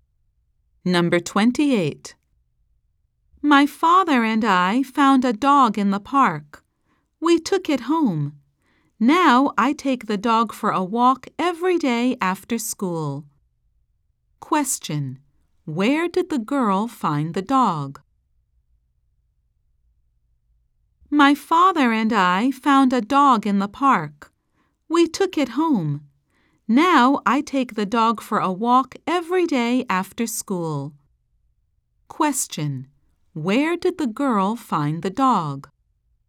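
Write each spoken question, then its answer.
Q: Where did the girl find the dog?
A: In the park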